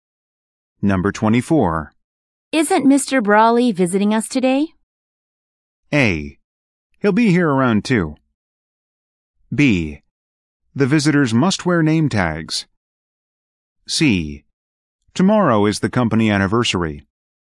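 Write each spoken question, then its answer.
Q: Isn't Mr. Brawley visiting us today?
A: A: He'll be here around 2.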